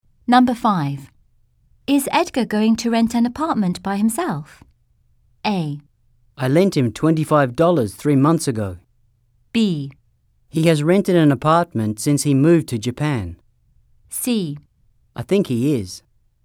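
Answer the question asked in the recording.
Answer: C: I think he is.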